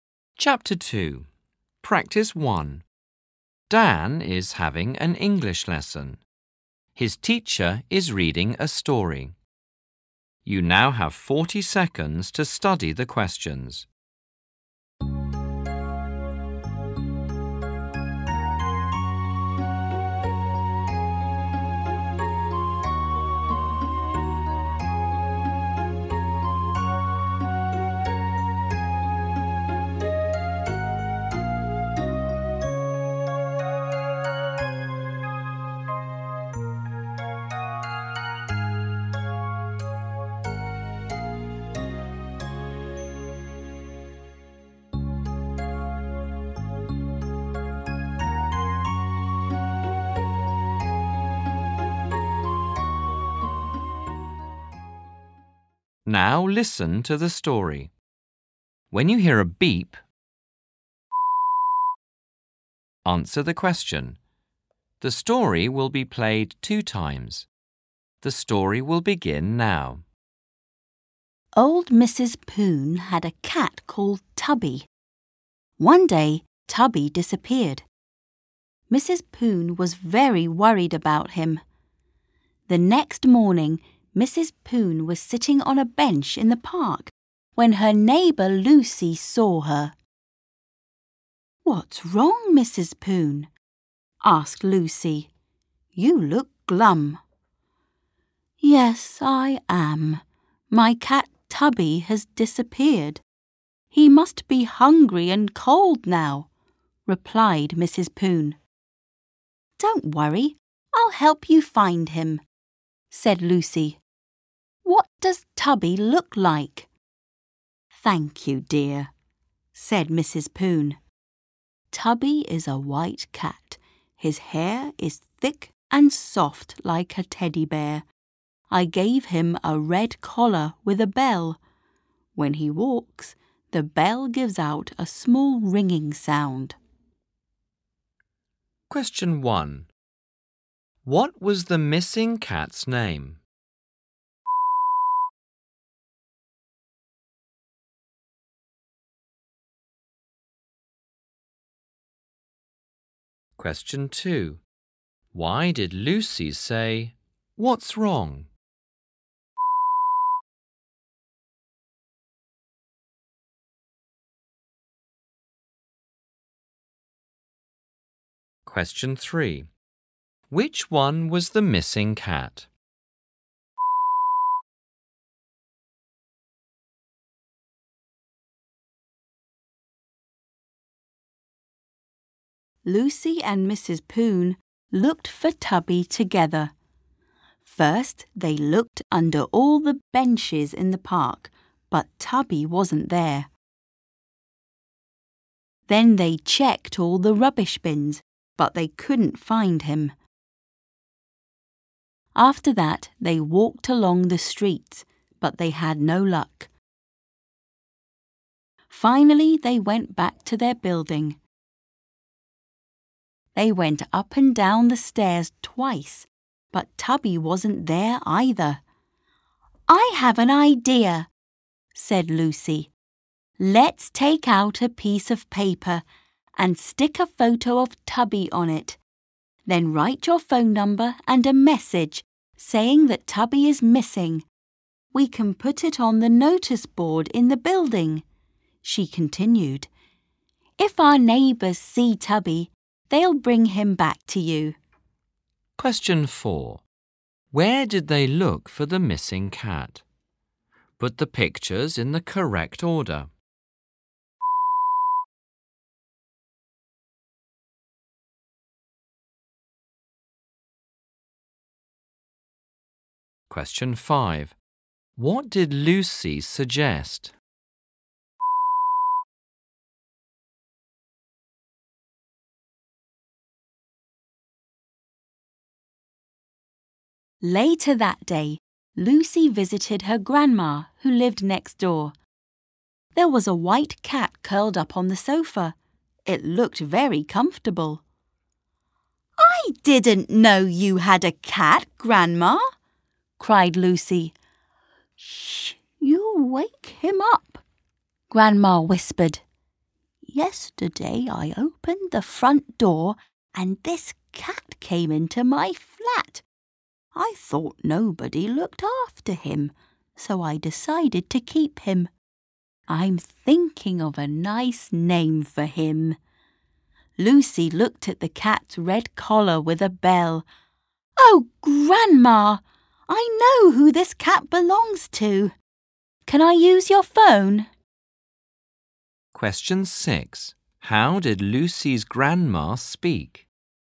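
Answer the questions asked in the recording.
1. Tubby
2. Because Mrs. Poon looked glum (sad)
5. Putting a notice with Tubby's photo and Mrs. Poon's phone number on the building's notice board
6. She whispered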